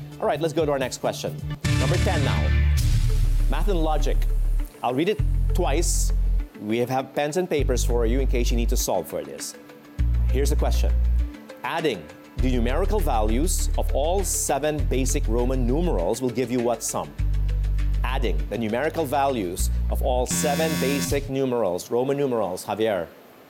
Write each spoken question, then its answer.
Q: Adding the numerical values of all 7 basic Roman numerals will give you what sum?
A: 1,666. 1 plus 5 plus 10 plus 50 plus 100 plus 500, then plus 1,000.